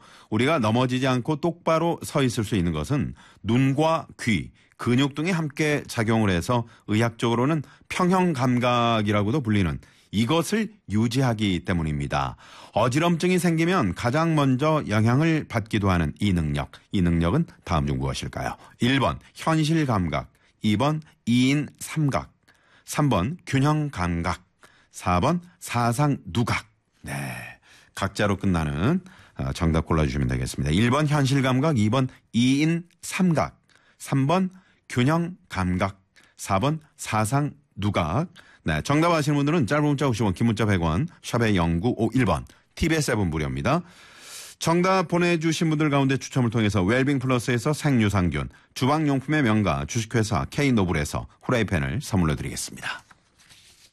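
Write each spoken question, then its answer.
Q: 이 능력은 다음 중 무엇일까요? 1번 현실감각, 2번 이인삼각, 3번 균형감각, 4번 사상누각.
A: 3: 균형감각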